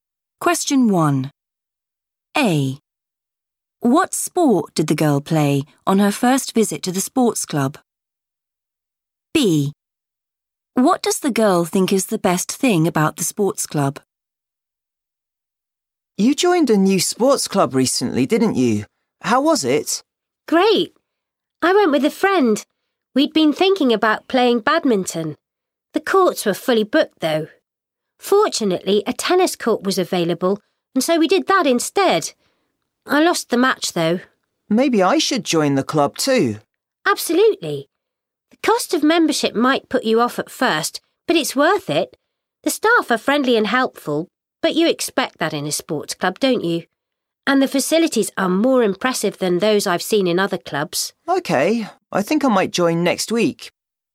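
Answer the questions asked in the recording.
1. tennis
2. the facilities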